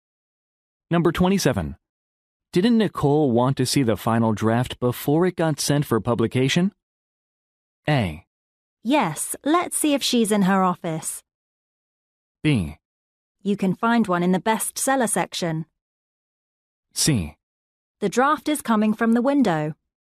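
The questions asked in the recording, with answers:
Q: Didn't Nicole want to see the final draft before it got sent for publication?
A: A: Yes, let's see if she's in her office.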